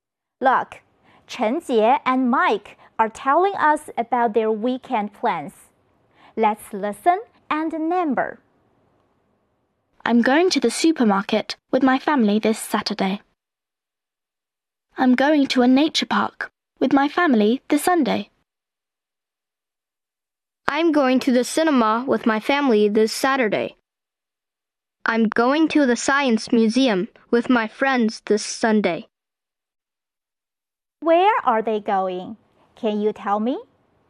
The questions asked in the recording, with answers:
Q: Where are they going? Can you tell me?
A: One.They are going to the supermarket.